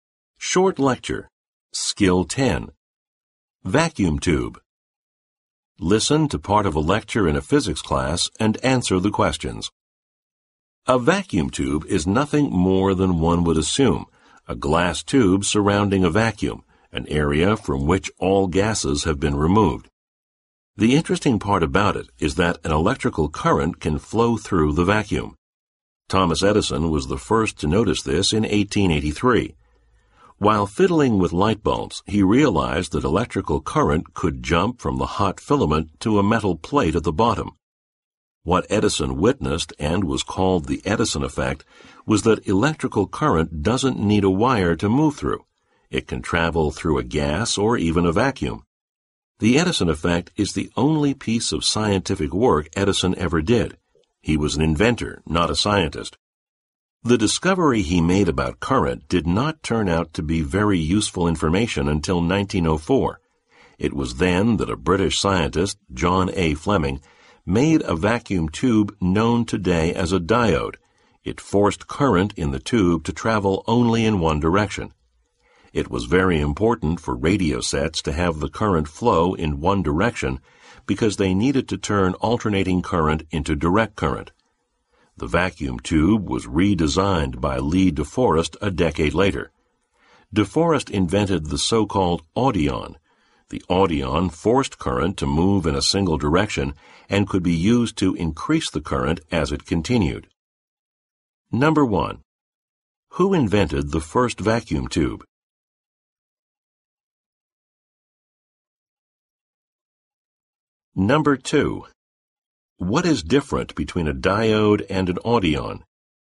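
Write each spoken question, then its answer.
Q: What is different between a diode and an audion?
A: The audion could also increase the current, not just force it to flow in one direction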